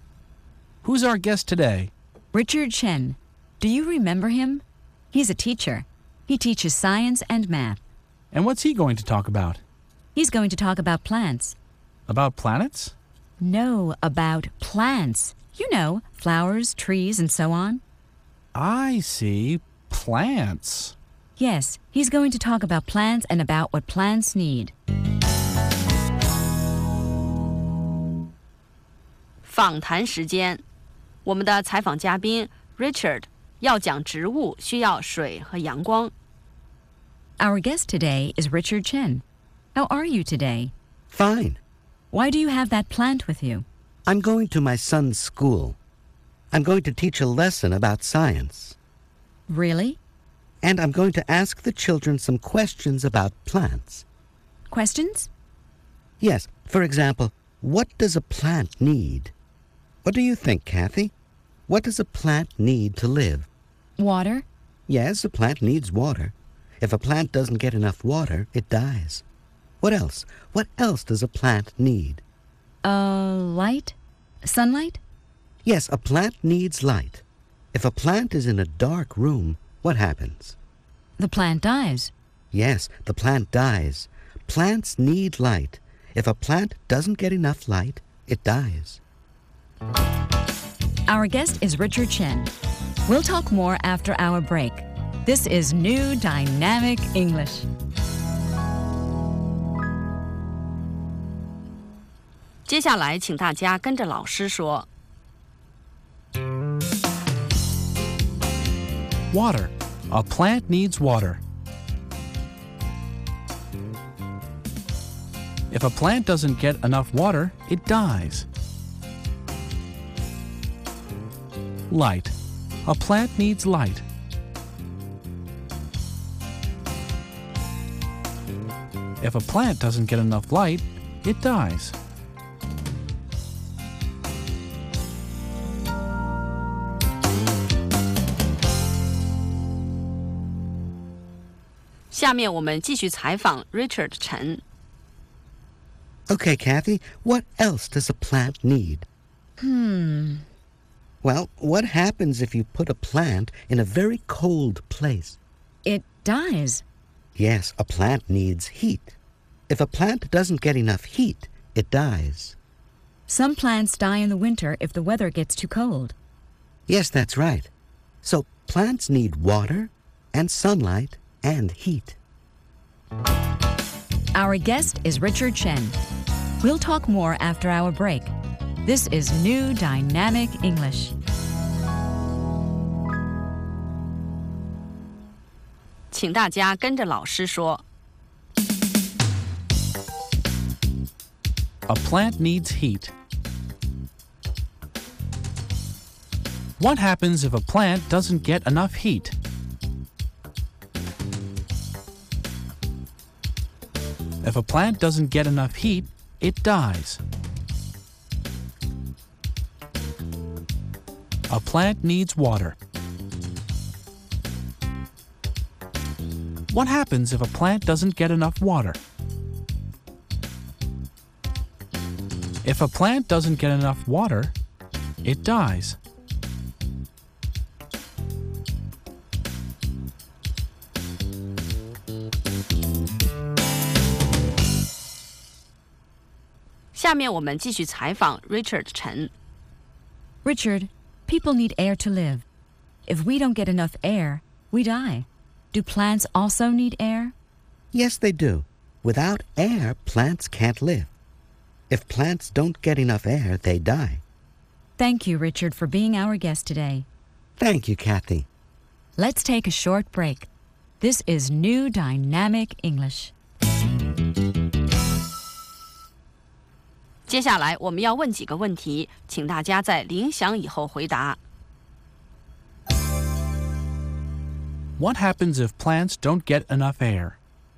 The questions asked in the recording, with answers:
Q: What happens if plants don't get enough air?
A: They die. If plants don't get enough air, they die.